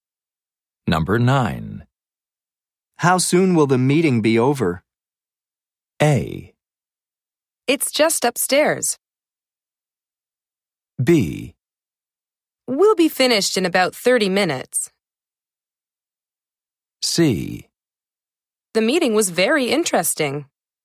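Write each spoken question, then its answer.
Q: How soon will the meeting be over?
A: B: We'll be finished in about 30 minutes.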